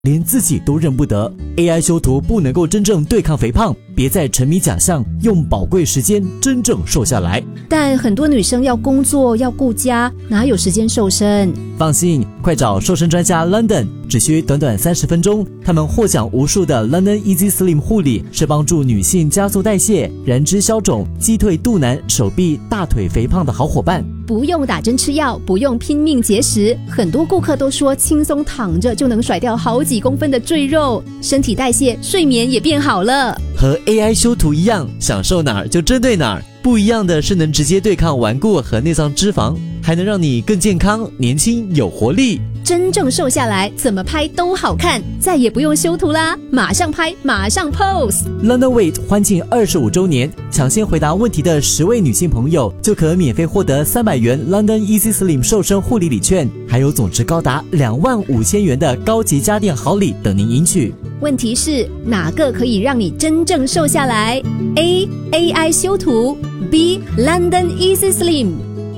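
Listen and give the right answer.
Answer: B: London Easy Slim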